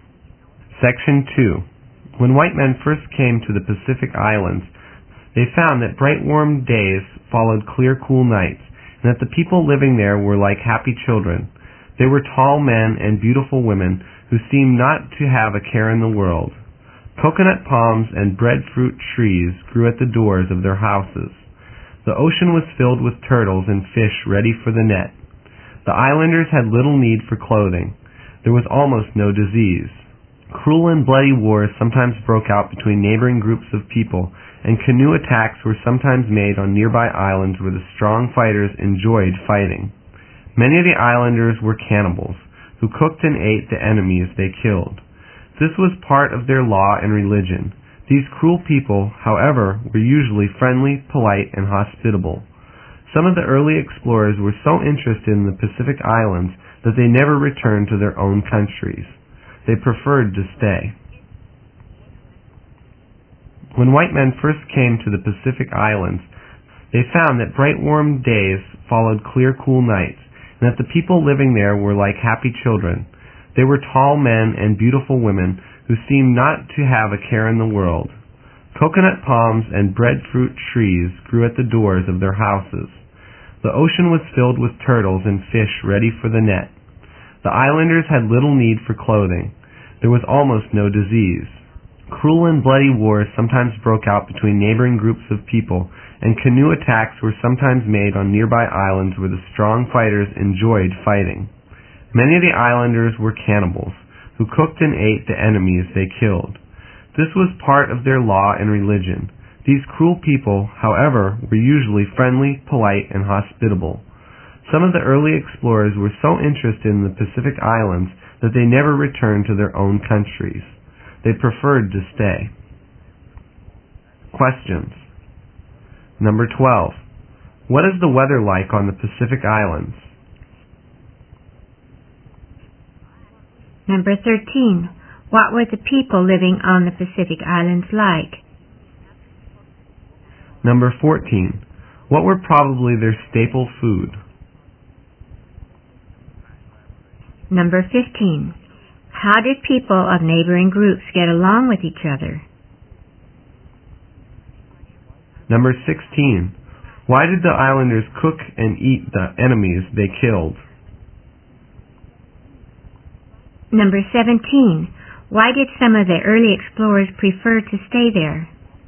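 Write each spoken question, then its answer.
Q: What is the weather like on the Pacific Islands?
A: Bright, warm days and clear, cool nights

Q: What were the people living on the Pacific Islands like?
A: Like happy children: tall men and beautiful women who didn't seem to have a care in the world

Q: What were probably their staple food?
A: Coconuts, breadfruit, turtles and fish

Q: How did people of neighboring groups get along with each other?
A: Not well; cruel, bloody wars sometimes broke out between them

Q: Why did the islanders cook and eat the enemies they killed?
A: It was part of their law and religion

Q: Why did some of the early explorers prefer to stay there?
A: They were very interested in the Pacific Islands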